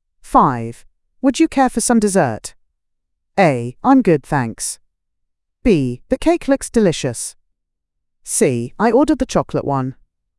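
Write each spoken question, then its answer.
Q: Would you care for some dessert?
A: A: I'm good, thanks.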